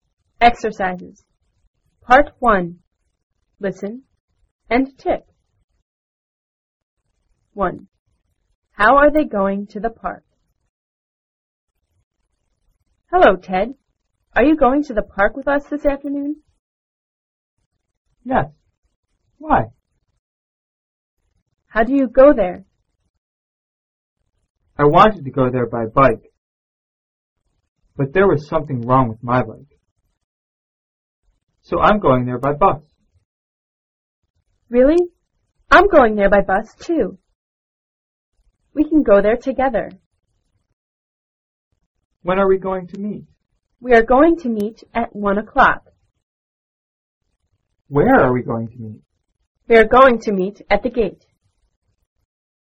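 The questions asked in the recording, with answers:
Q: How are they going to the park?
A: By bus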